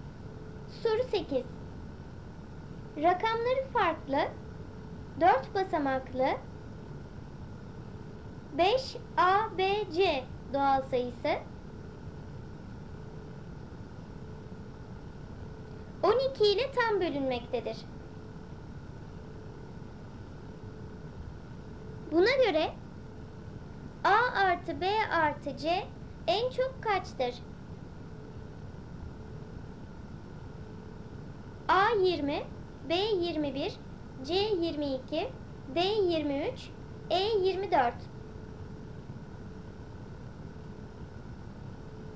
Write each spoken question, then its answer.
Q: Buna göre A artı B artı C en çok kaçtır?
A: Doğru cevap C 22.